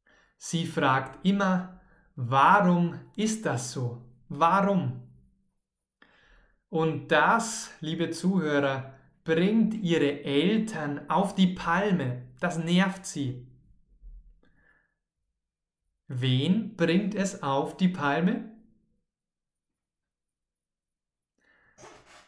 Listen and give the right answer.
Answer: Ihre Eltern, genau. Das bringt ihre Eltern auf die Palme.